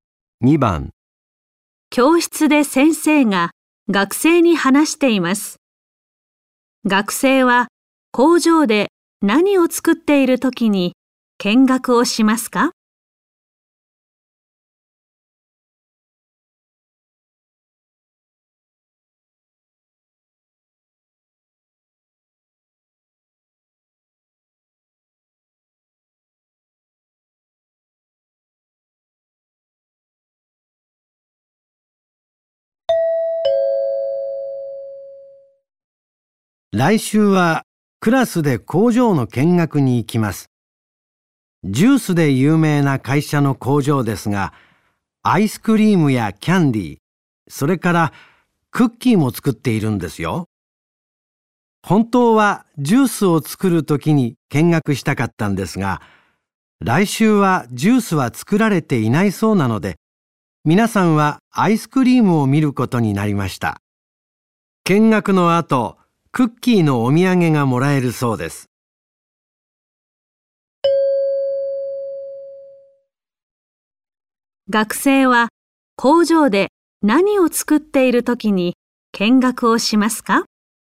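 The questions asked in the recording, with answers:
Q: 学生は工場で何を作っている時に見学をしますか?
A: アイスクリーム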